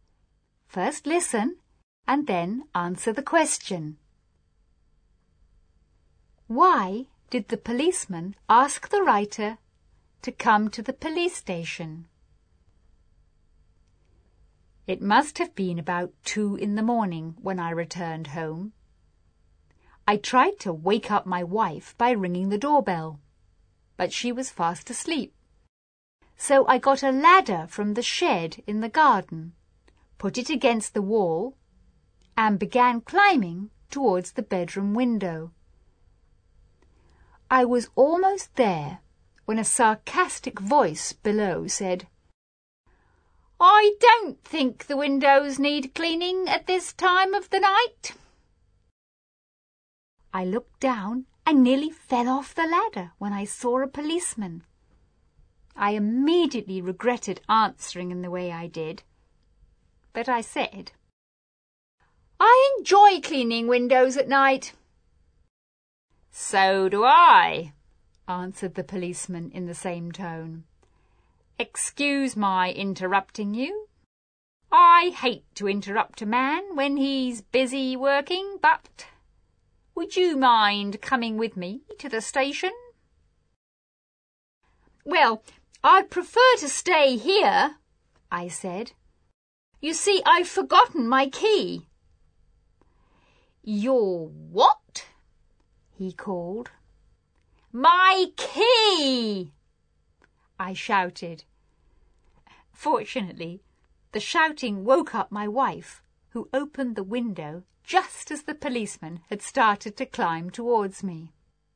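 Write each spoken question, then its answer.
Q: Why did the policeman ask the writer to come to the police station?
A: Because he saw him climbing a ladder to a window at 2 a.m. and thought he was a burglar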